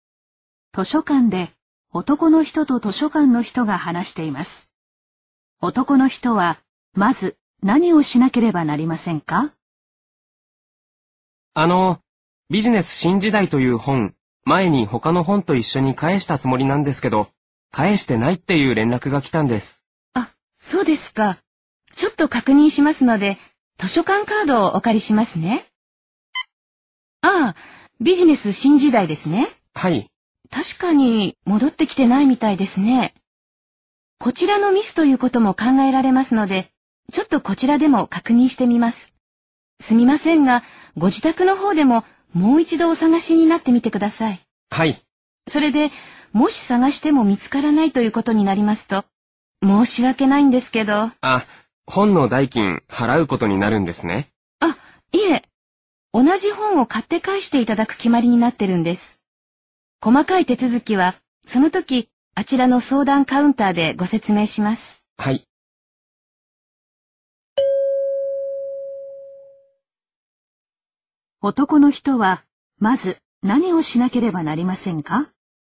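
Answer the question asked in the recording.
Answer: 自宅でもう一度本を探す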